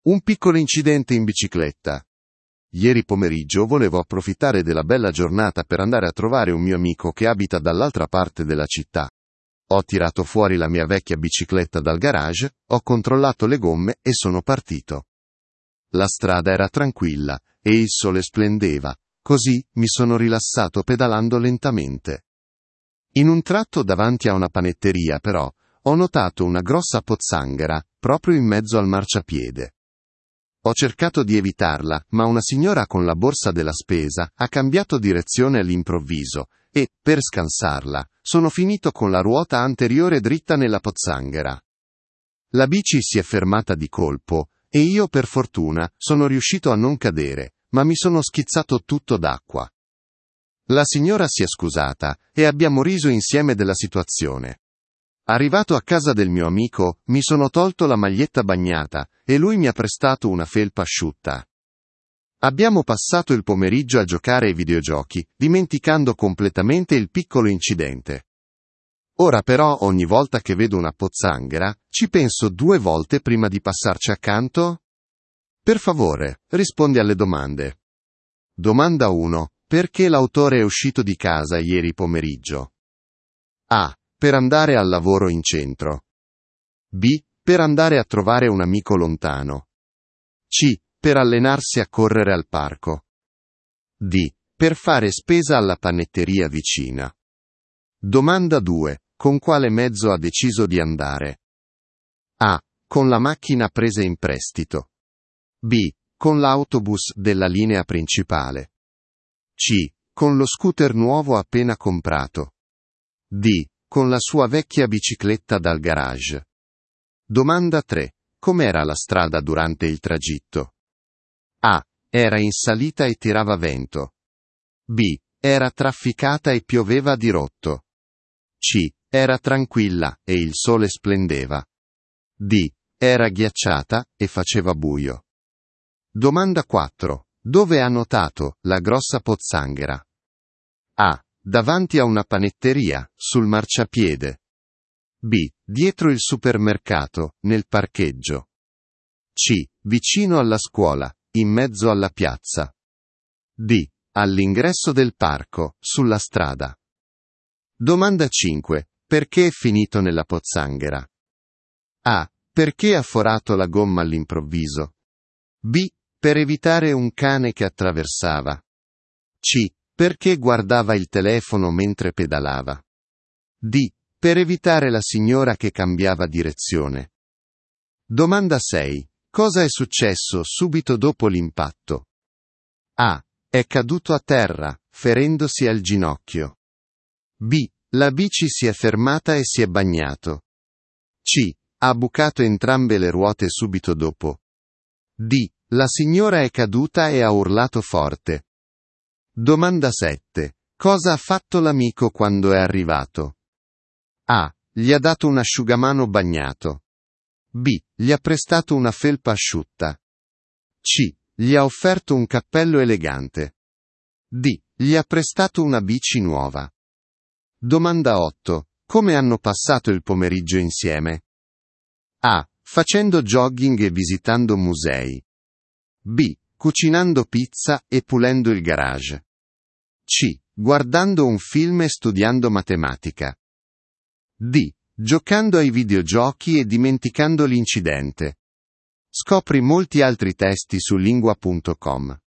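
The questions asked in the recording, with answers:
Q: Perché l'autore è uscito di casa ieri pomeriggio?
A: B: Per andare a trovare un amico lontano.

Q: Con quale mezzo ha deciso di andare?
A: D: Con la sua vecchia bicicletta dal garage.

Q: Com'era la strada durante il tragitto?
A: C: Era tranquilla e il sole splendeva.

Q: Dove ha notato la grossa pozzanghera?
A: A: Davanti a una panetteria, sul marciapiede.

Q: Perché è finito nella pozzanghera?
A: D: Per evitare la signora che cambiava direzione.

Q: Cosa è successo subito dopo l'impatto?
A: B: La bici si è fermata e si è bagnato.

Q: Cosa ha fatto l'amico quando è arrivato?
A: B: Gli ha prestato una felpa asciutta.

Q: Come hanno passato il pomeriggio insieme?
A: D: Giocando ai videogiochi e dimenticando l'incidente.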